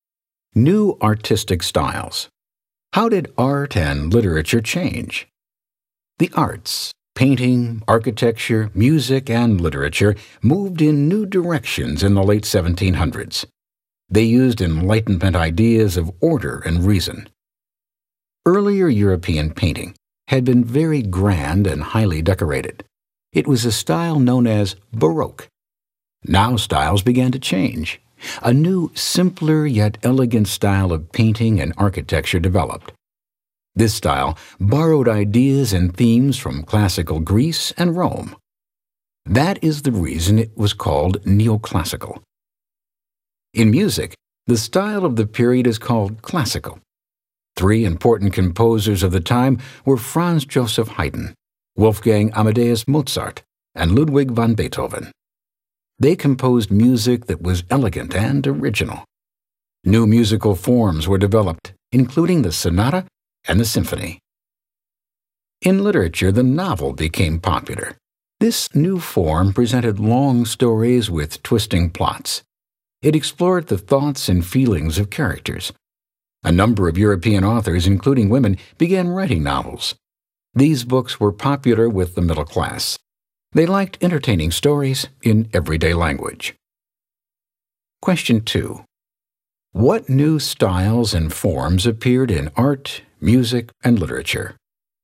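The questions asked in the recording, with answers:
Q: What new styles and forms appeared in art, music, and literature?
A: Neoclassical art and architecture, classical music with the sonata and symphony, and the novel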